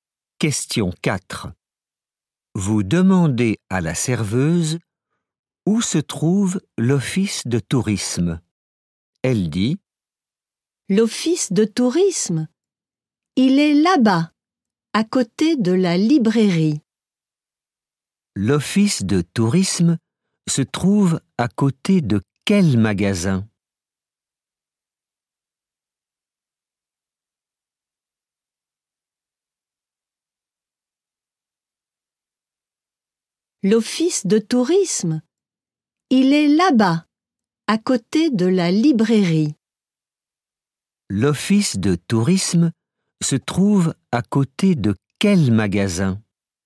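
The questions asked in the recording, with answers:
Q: L'office de tourisme se trouve à côté de quel magasin ?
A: la librairie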